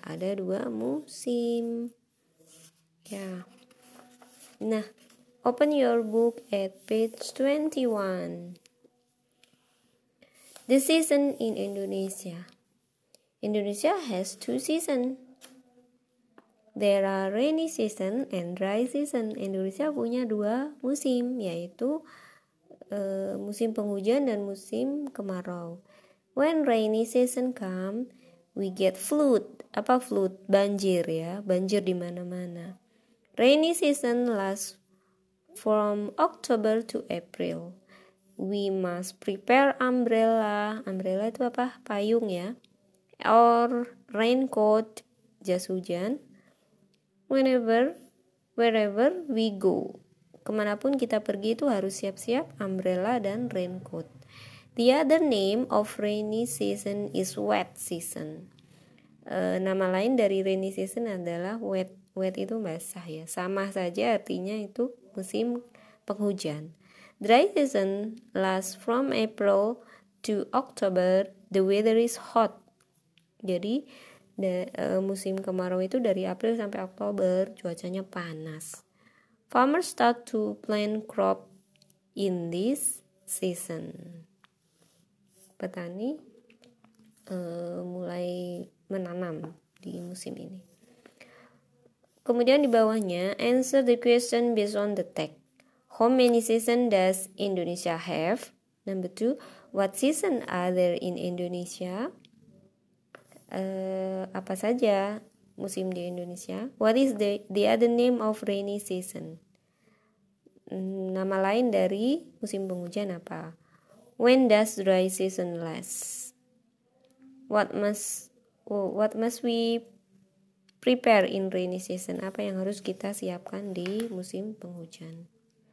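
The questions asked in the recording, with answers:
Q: How many season does Indonesia have?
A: Two seasons

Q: what season are there in Indonesia?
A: Rainy season and dry season

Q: What is the the other name of rainy season?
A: Wet season

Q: When does dry season last?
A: From April to October

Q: What must oh, what must we prepare in rainy season?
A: An umbrella or a raincoat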